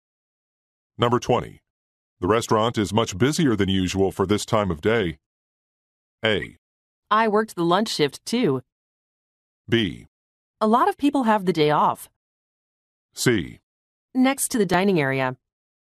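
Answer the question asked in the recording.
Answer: B: A lot of people have the day off.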